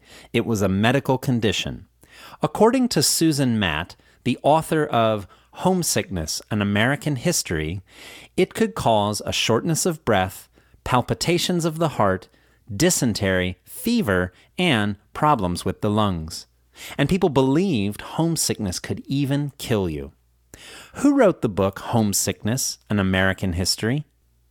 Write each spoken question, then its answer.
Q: Who wrote the book Homesickness, An American History?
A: Susan Matt wrote the book Homesickness, An American History.